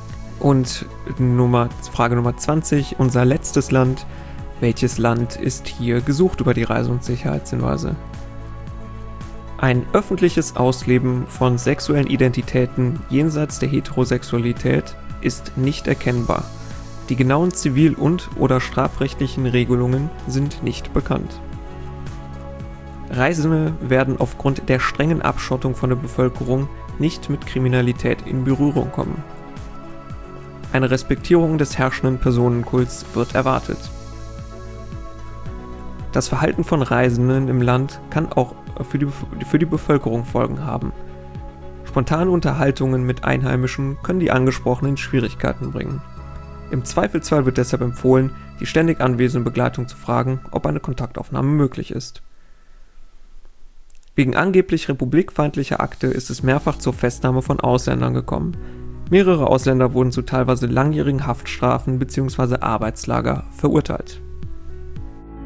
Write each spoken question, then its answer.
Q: Welches Land ist hier gesucht über die Reise- und Sicherheitshinweise?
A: Nordkorea war hier gesucht.